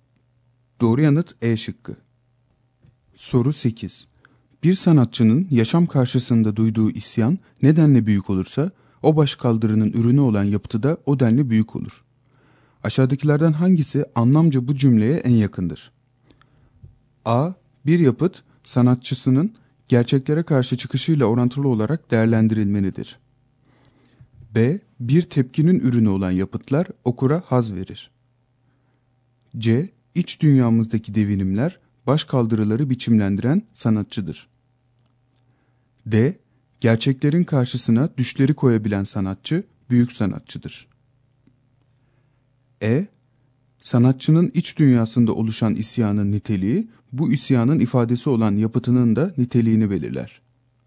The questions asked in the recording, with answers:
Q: Aşağıdakilerden hangisi anlamca bu cümleye en yakındır?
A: Doğru yanıt E şıkkı.